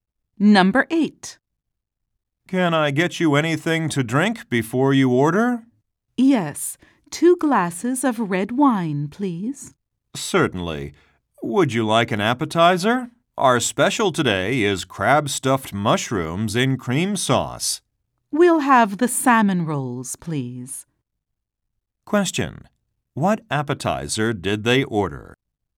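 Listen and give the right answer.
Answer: Salmon rolls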